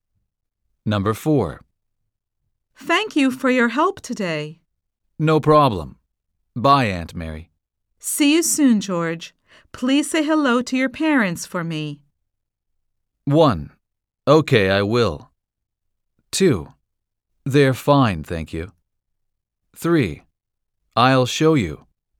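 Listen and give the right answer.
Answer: 1: Okay, I will.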